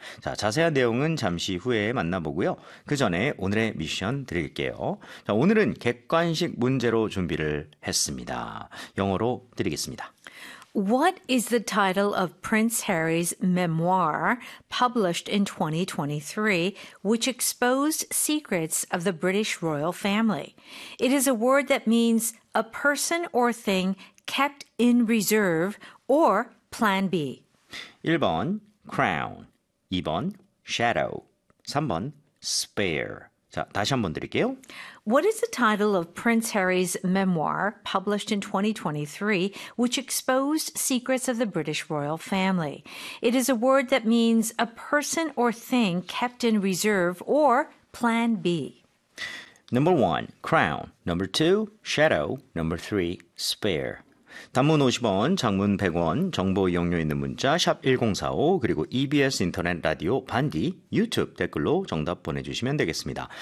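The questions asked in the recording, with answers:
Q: What is the title of Prince Harry's memoir published in 2023, which exposed secrets of the British royal family?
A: 3: spare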